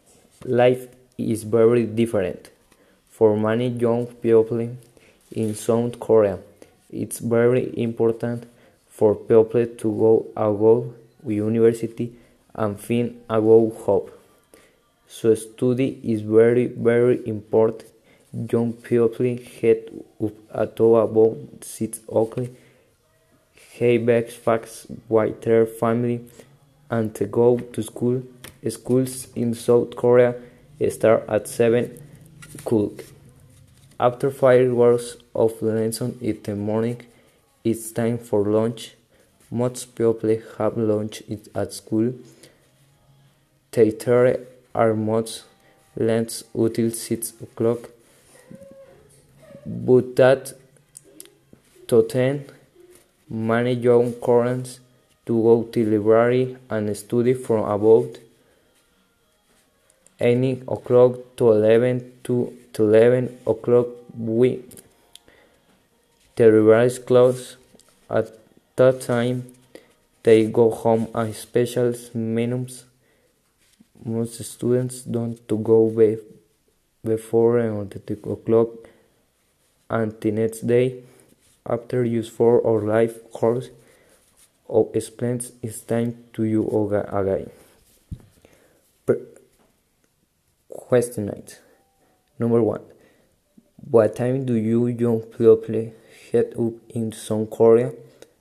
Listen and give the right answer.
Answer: They head up about 6 o'clock.